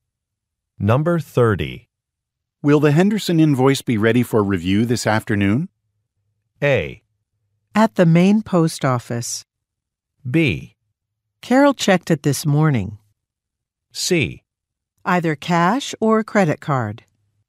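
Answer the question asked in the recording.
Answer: B: Carol checked it this morning.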